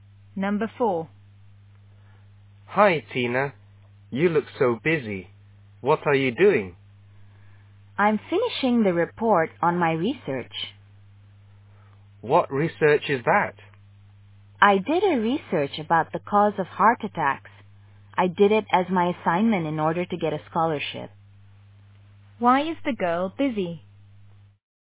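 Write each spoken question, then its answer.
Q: Why is the girl busy?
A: She is finishing the report on her research (about the cause of heart attacks).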